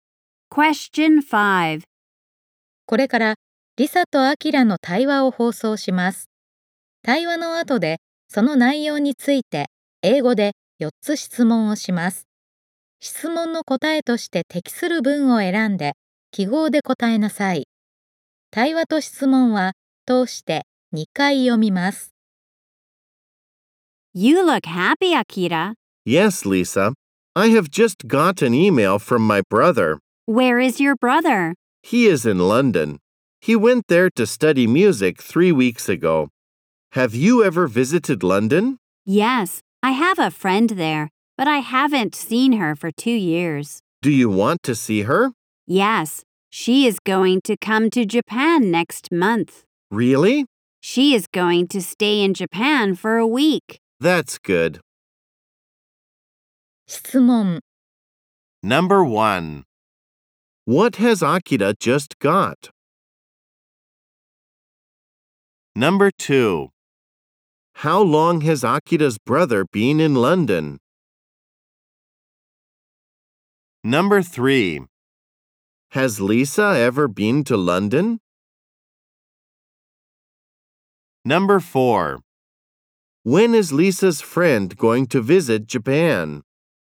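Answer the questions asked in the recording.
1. An email from his brother.
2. For three weeks.
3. Yes, she has.
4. Next month.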